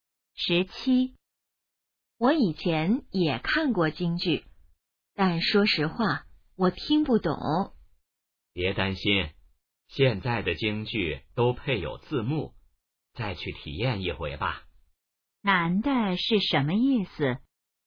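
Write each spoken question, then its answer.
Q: 男的是什么意思?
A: 建议再去看一次京剧,现在有字幕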